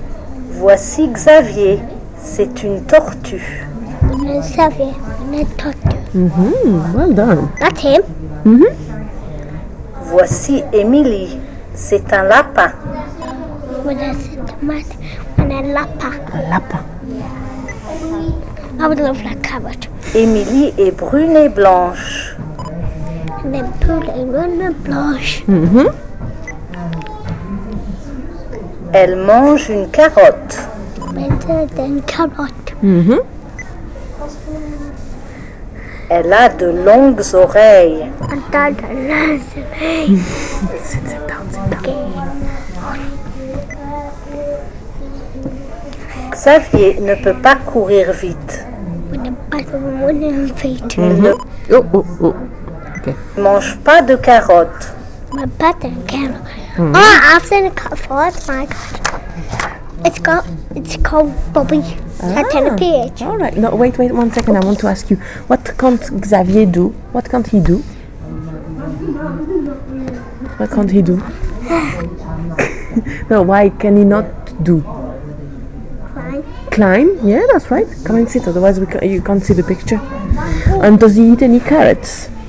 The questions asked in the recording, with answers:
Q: And does he eat any carrots?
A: No? Well done.